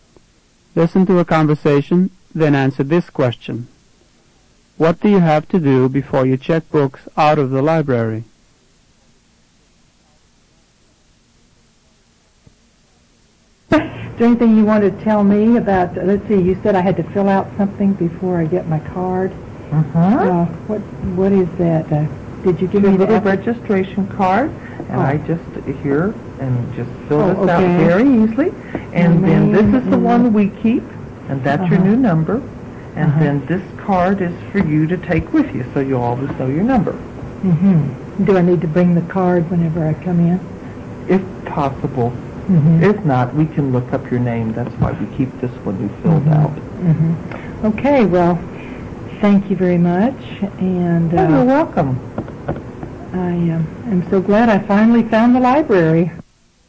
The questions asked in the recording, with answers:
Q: What do you have to do before you check books out of the library?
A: Fill out a registration card.